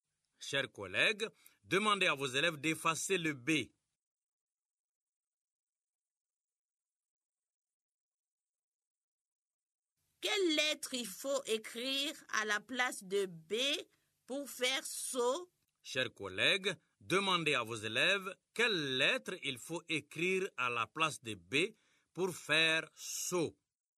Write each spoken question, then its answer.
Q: Quelle lettre il faut écrire à la place de B pour faire saut?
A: Grand-mère, c'est S.